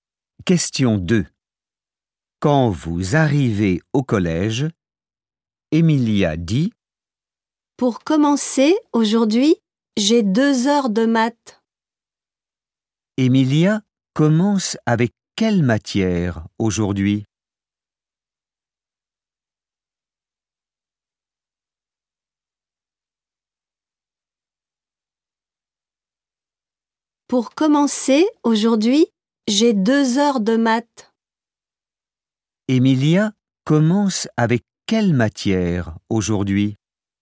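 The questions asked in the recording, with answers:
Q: Emilia commence avec quelle matière aujourd'hui ?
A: Les maths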